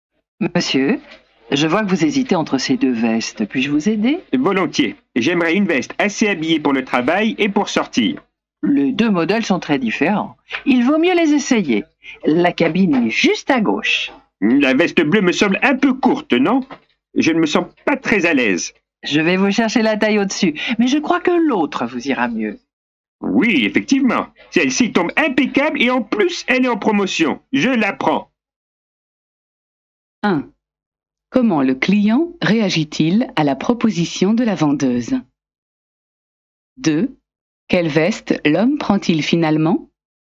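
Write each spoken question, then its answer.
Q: Comment le client réagit-il à la proposition de la vendeuse?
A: Il accepte volontiers son aide

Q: Quelle veste l'homme prend-il finalement?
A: L'autre veste (pas la bleue), celle qui est en promotion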